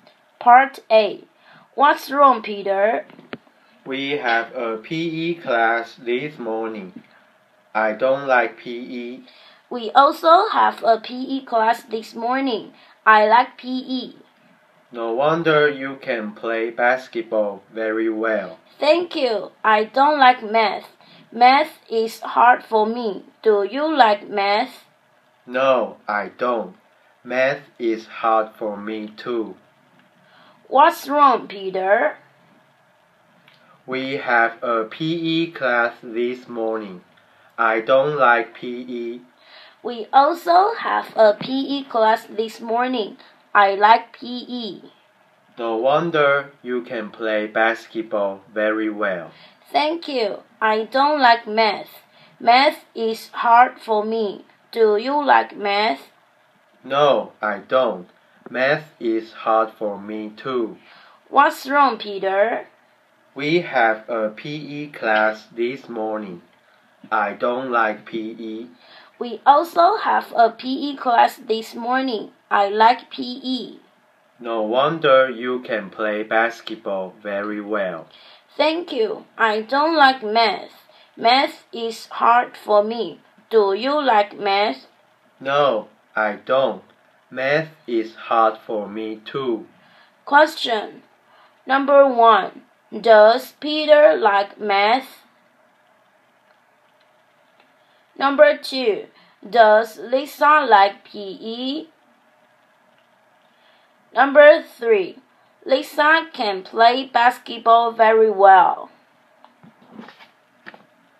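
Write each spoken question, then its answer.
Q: Does Peter like math?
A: No (F)

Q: Does Lisa like PE?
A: Yes (T)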